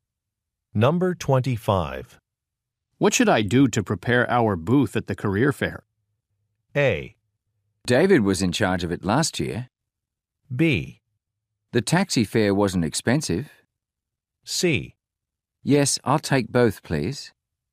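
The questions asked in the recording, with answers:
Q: What should I do to prepare our booth at the career fair?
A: A: David was in charge of it last year.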